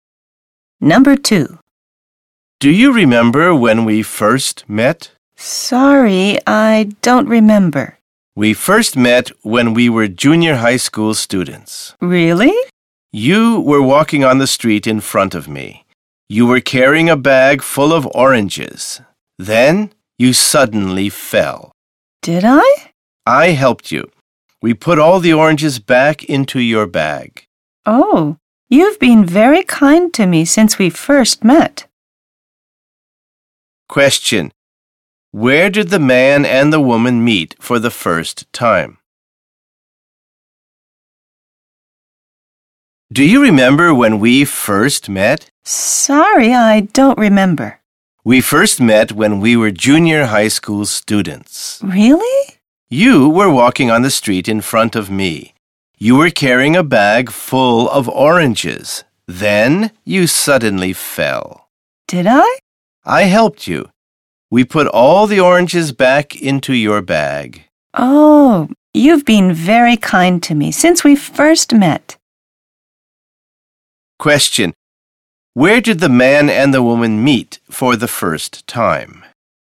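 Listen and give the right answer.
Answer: On the street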